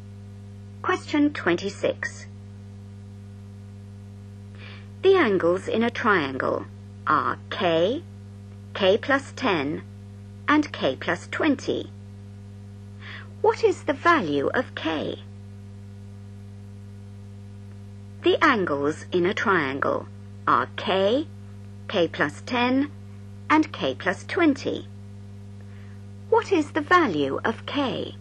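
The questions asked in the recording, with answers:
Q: What is the value of K?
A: 50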